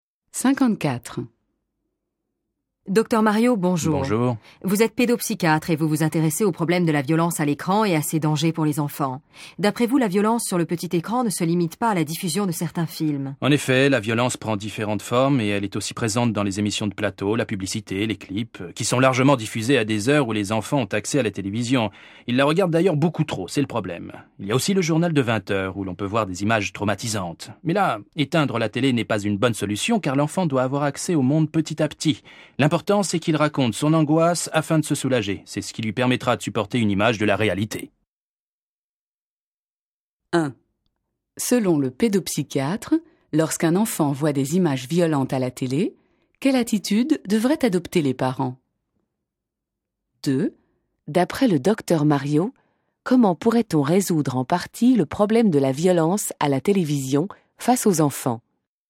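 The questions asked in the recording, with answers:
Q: Selon le pédopsychiatre, lorsqu'un enfant voit des images violentes à la télé, quelle attitude devraient adopter les parents?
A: Ne pas éteindre la télé, mais laisser l'enfant raconter son angoisse pour se soulager.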